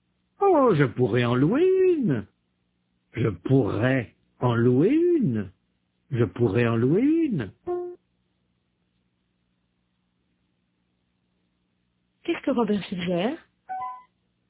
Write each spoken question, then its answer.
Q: Qu'est-ce que Robert suggère?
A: D'en louer une.